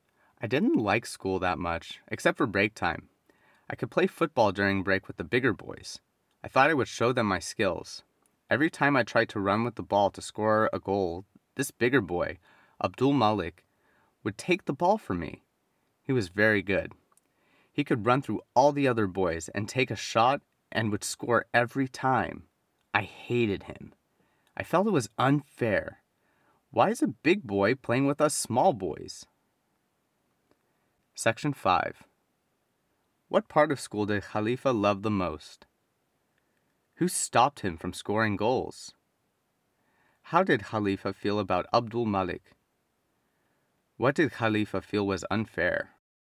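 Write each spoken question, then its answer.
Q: What part of school did Khalifa love the most?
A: Break time

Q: Who stopped him from scoring goals?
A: Abdul Malik

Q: How did Khalifa feel about Abdul Malik?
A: He hated him

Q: What did Khalifa feel was unfair?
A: That a big boy was playing with the small boys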